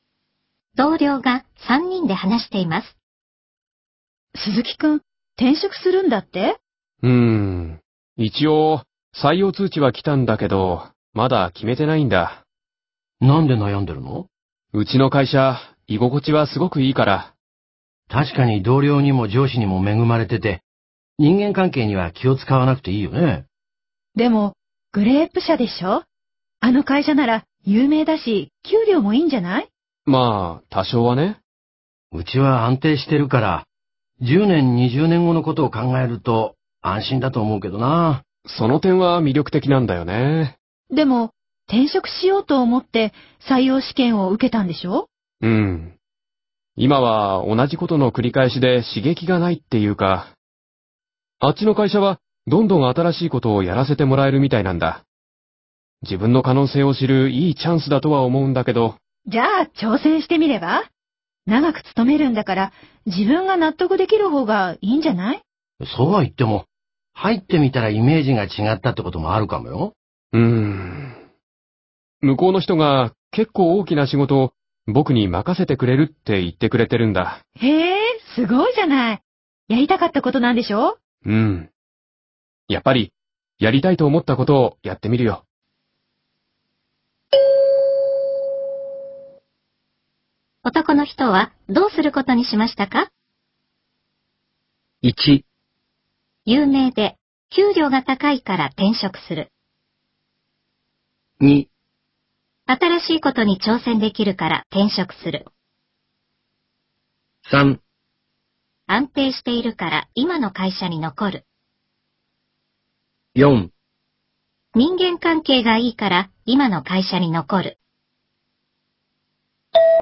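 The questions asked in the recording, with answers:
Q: 男の人はどうすることにしましたか?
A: 2: 新しいことに挑戦できるから転職する。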